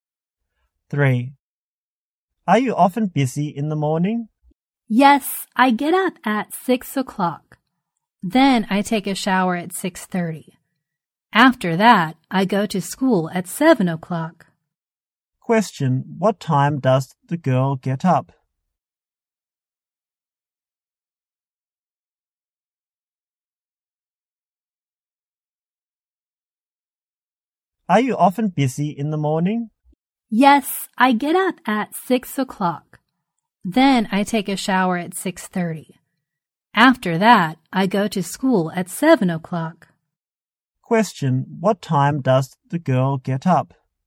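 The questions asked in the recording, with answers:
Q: what time does the girl get up?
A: 6 o'clock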